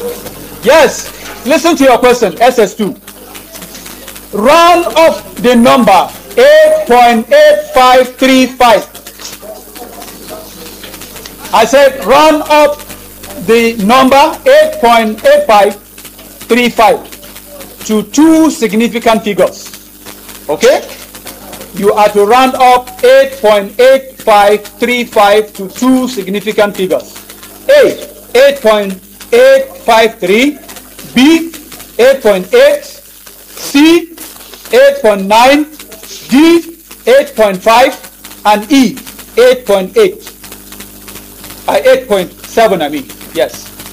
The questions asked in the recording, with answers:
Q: You are to round up 8.8535 to two significant figures.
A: 8.9! Yes! Yes, that's good.